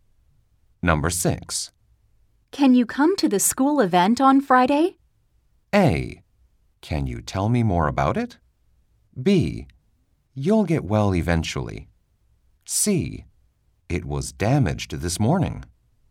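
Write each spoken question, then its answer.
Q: Can you come to the school event on Friday?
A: A: Can you tell me more about it?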